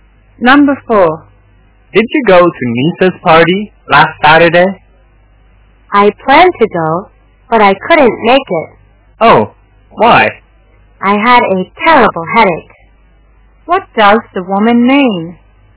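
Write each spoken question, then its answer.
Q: What does the woman mean?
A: She didn't go to the party because she had a terrible headache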